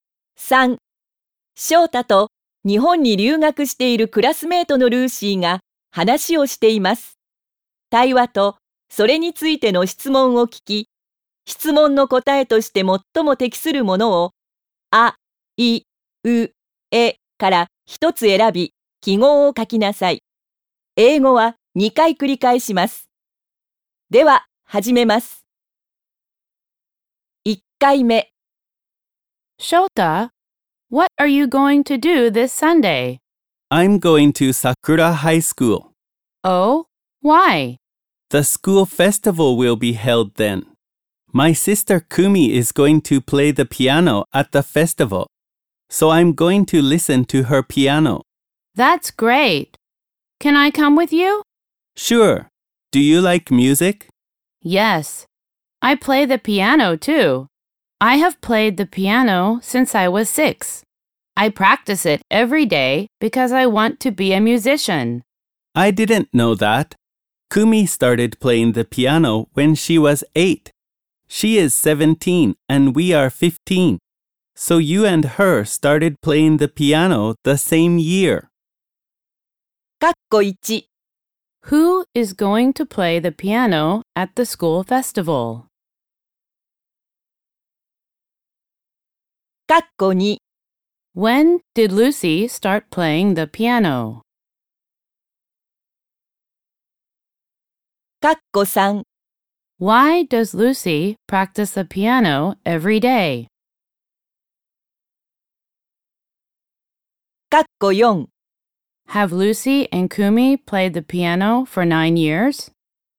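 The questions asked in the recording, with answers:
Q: Who is going to play the piano at the school festival?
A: Kumi, Shota's sister

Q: When did Lucy start playing the piano?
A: When she was 6

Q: Why does Lucy practice the piano every day?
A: Because she wants to be a musician

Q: Have Lucy and Kumi played the piano for 9 years?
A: Yes, they have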